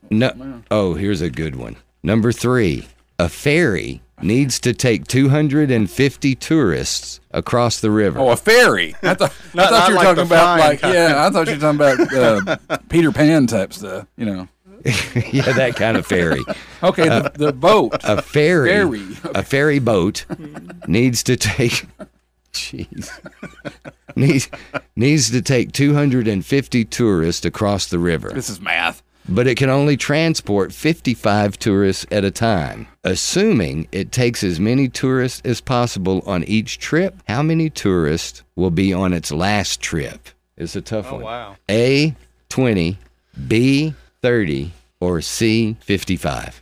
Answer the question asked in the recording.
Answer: It is 30.